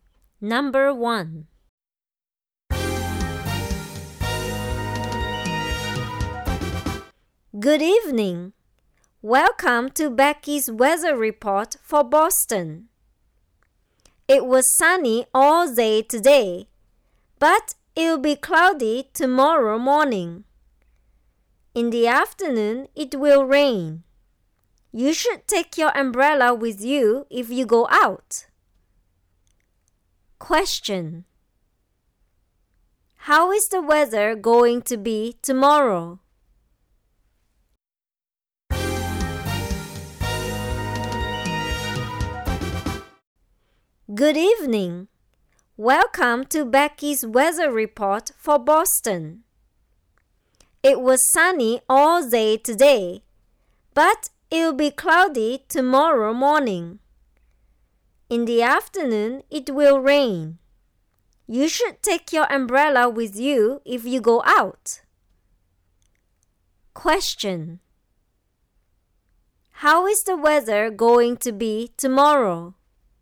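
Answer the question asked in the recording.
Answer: Cloudy in the morning, then rain in the afternoon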